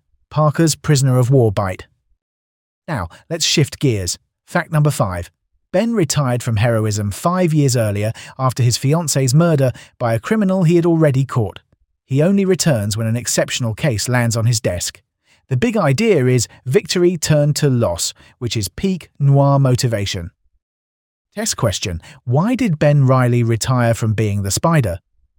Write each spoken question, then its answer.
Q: Why did Ben Reilly retire from being the Spider?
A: His fiancée's murder.